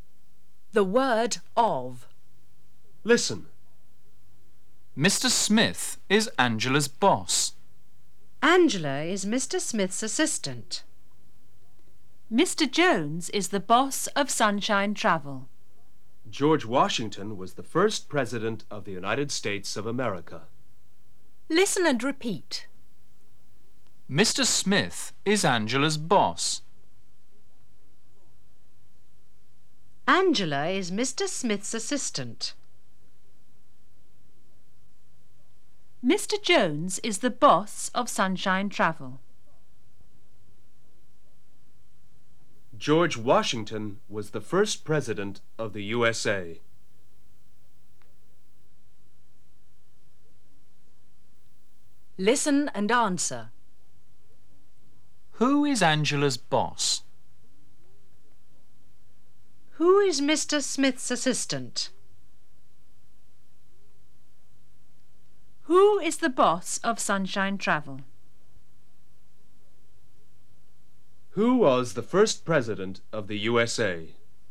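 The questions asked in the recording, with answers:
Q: Who is Angela's boss?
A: Mr. Smith

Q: Who is Mr. Smith's assistant?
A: Angela

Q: Who is the boss of Sunshine Travel?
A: Mr. Jones

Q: Who was the first president of the USA?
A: George Washington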